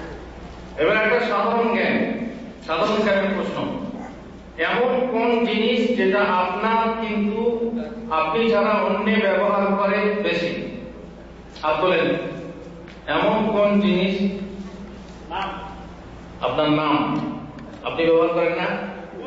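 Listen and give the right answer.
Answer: নাম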